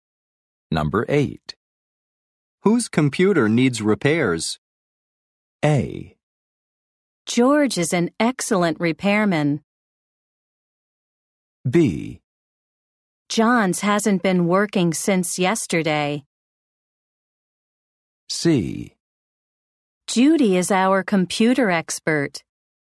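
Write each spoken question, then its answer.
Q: Whose computer needs repairs?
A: B: John's hasn't been working since yesterday.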